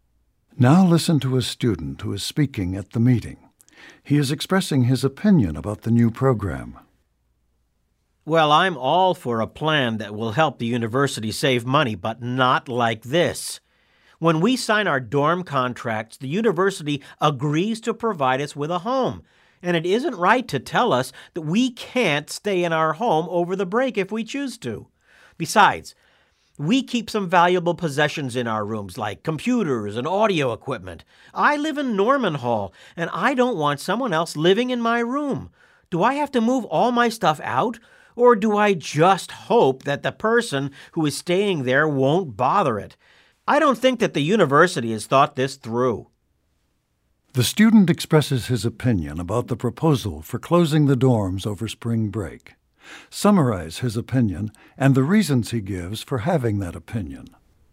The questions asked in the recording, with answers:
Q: Summarize his opinion and the reasons he gives for having that opinion.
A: The man thinks that students should be able to stay in their dorm rooms over spring break if they choose to.